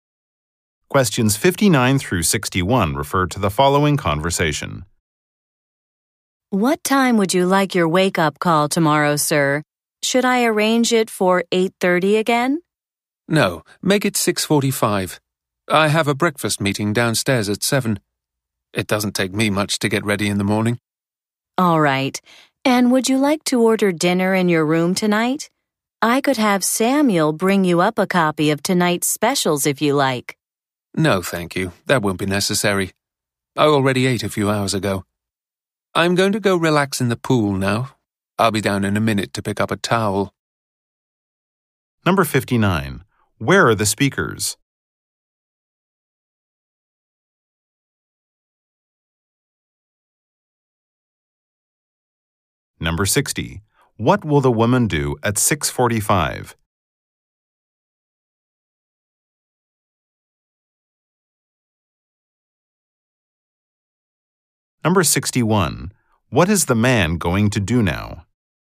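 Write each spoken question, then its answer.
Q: Where are the speakers?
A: In a hotel.

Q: What will the woman do at 6:45?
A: Give the man a wake-up call.

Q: What is the man going to do now?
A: Relax in the pool.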